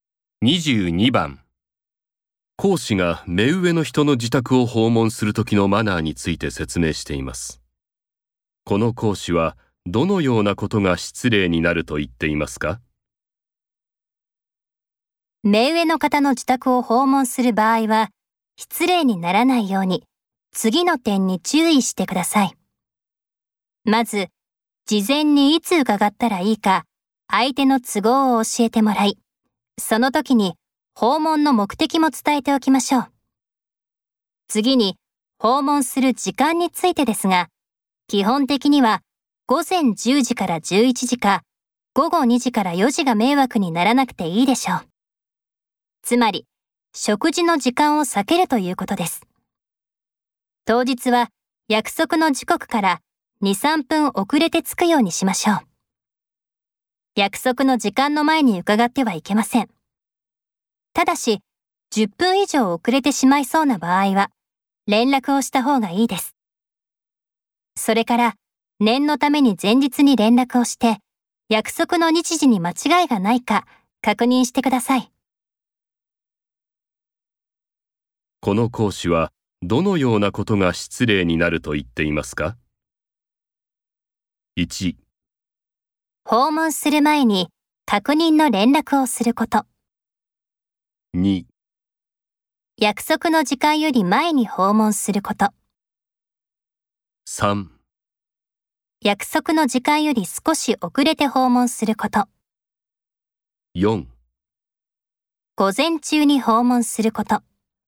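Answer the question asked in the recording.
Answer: 2: 約束の時間より前に訪問すること。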